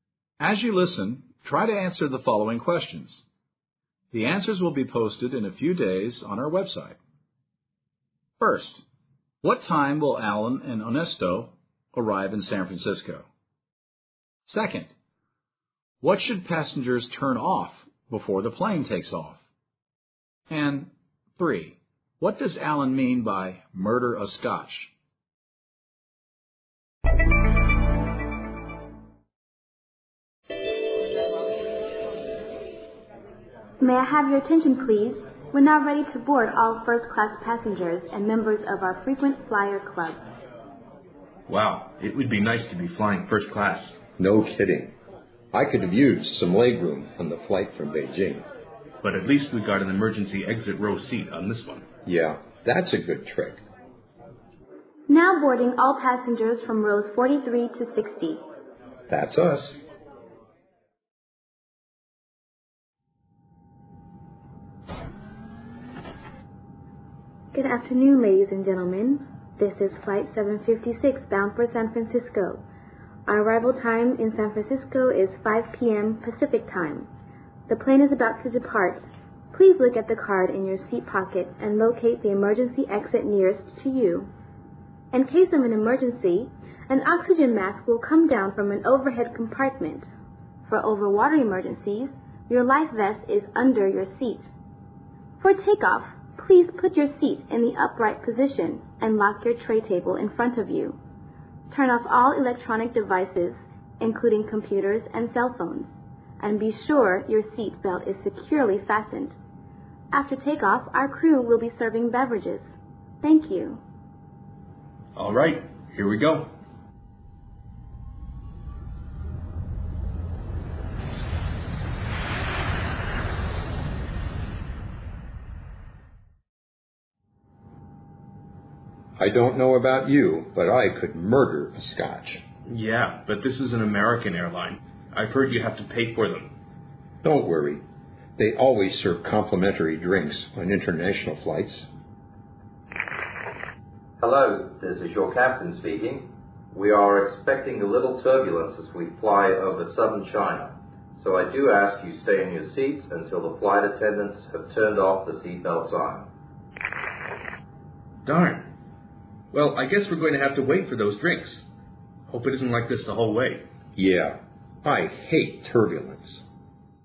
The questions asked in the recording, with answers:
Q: what should passengers turn off before the plane takes off?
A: She asks the passengers to turn off all electronic devices such as cell phones and computers

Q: what does Alan mean by murder a Scotch?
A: I could murder a Scotch means something like, I really, really want a drink right now.